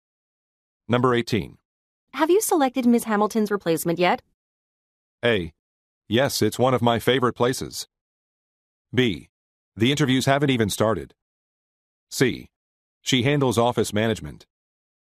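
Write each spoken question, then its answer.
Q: Have you selected Ms. Hamilton's replacement yet?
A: B: The interviews haven't even started.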